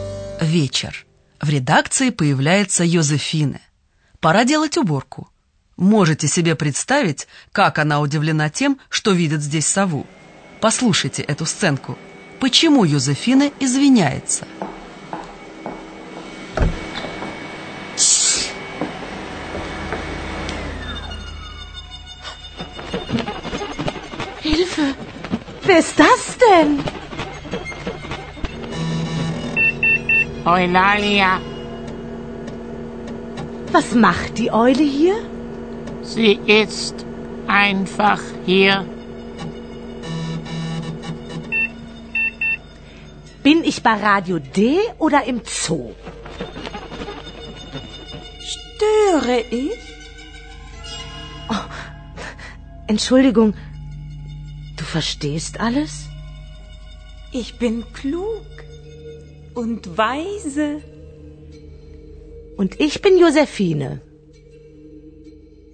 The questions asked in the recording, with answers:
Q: Почему Йозефина извиняется?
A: Ойлалия все понимает, и Йозефине становится неловко за свою реакцию.